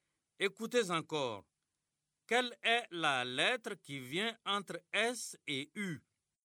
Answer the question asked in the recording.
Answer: Monsieur, c'était.